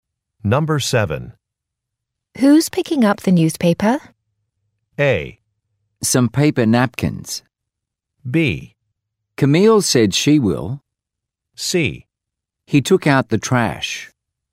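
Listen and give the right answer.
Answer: B: Camille said she will.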